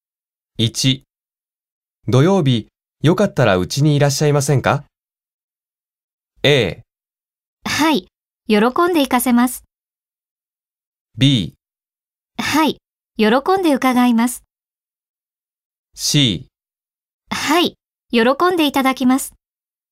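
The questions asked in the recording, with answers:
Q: 土曜日よかったらうちにいらっしゃいませんか?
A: B: はい、喜んで伺います。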